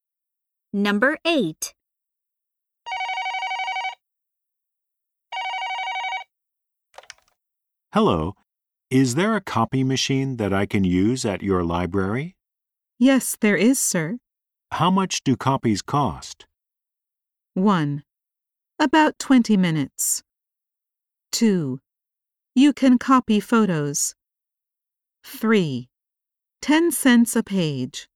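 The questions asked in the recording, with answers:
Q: How much do copies cost?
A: 3: 10 cents a page.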